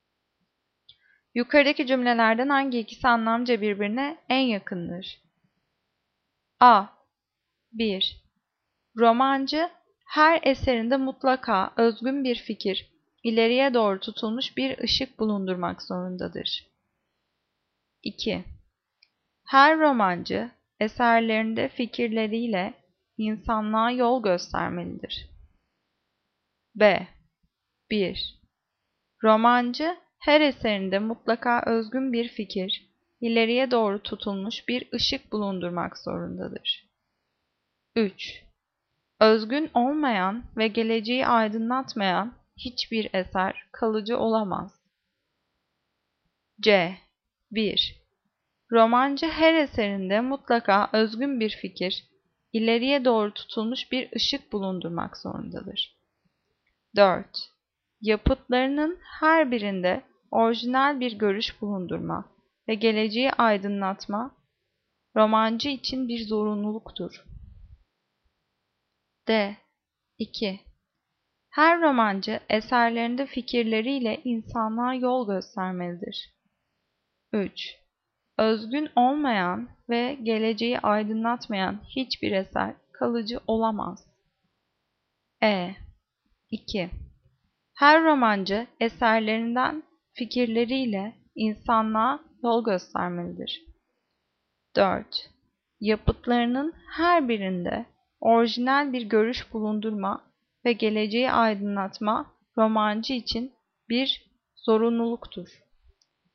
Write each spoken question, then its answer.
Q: Yukarıdaki cümlelerden hangi ikisi anlamca birbirine en yakındır?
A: Cevap C. 1. Romancı her eserinde mutlaka özgün bir fikir, ileriye doğru tutulmuş bir ışık bulundurmak zorundadır.